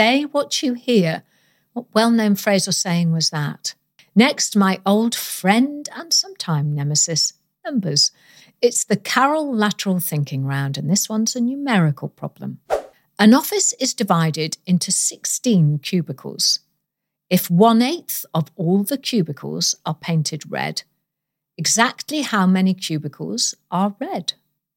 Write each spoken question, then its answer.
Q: If 1/8 of all the cubicles are painted red, exactly how many cubicles are red?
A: And the answer is 2.